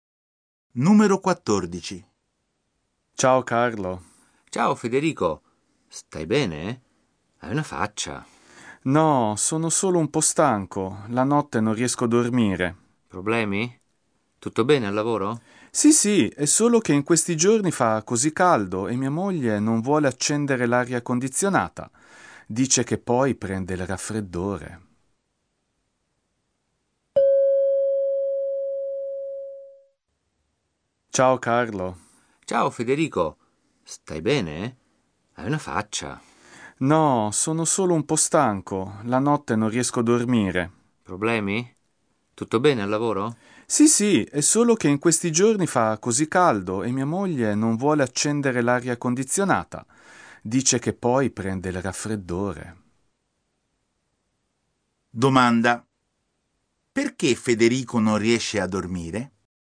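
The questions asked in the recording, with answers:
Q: Perché Federico non riesce a dormire?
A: Perché fa caldo e la moglie non vuole accendere l'aria condizionata.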